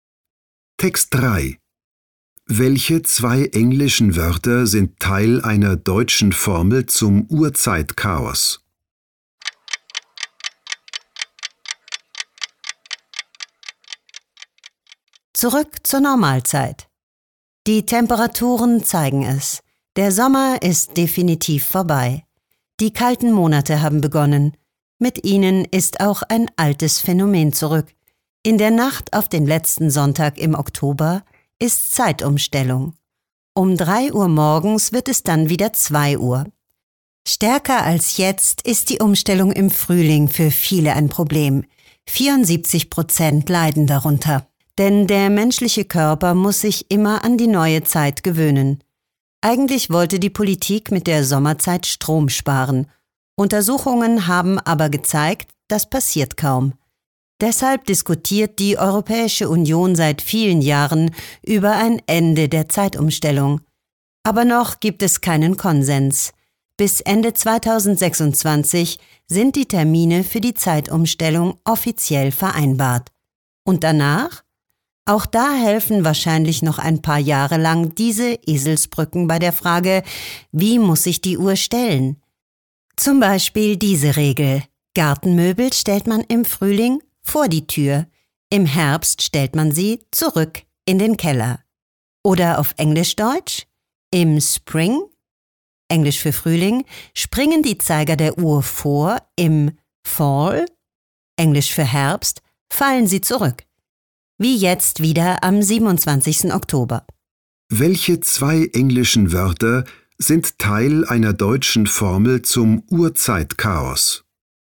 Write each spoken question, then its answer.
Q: Welche zwei englischen Wörter sind Teil einer deutschen Formel zum Uhrzeitchaos?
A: Spring und Fall.